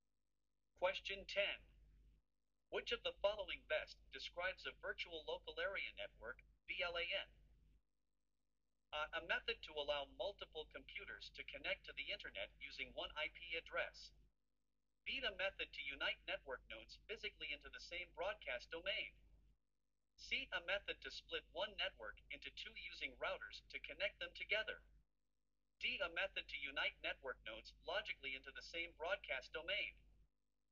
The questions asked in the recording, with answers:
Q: Which of the following best describes a virtual local area network, VLAN?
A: The correct answer is D.